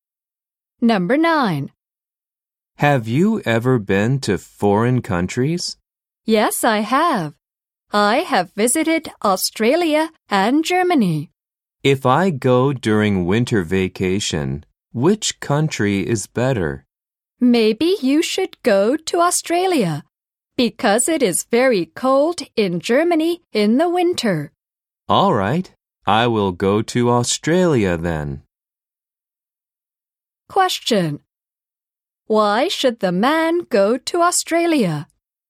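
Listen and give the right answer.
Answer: Because it is very cold in Germany in the winter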